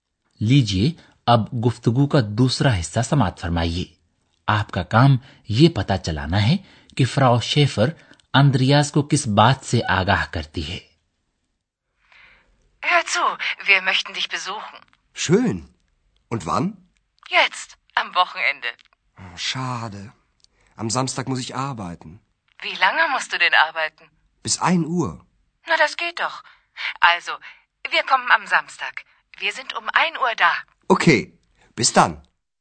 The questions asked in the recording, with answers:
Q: آپ کا کام یہ پتا چلانا ہے کہ Frau Schaefer اندریاز کو کس بات سے آگاہ کرتی ہے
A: اندریاس کی والدہ اسے بتاتی ہے کہ وہ ہفتے کے روز ایک بجے وہاں یعنی آخن میں hotel میں اس کے پاس پہنچ جائیں گے